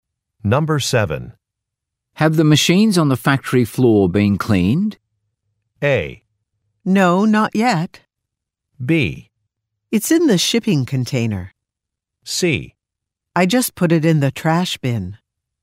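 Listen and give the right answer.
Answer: A: No, not yet.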